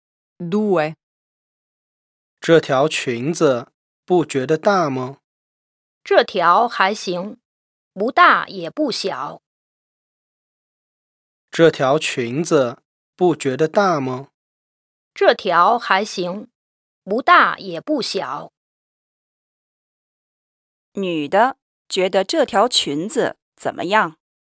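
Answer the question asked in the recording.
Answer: 还行,不大也不小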